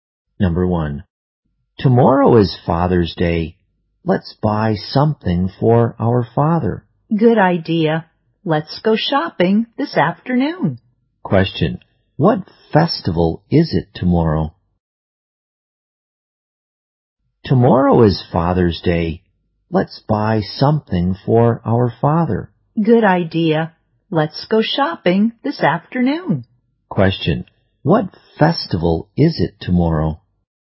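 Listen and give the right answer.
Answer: Father's Day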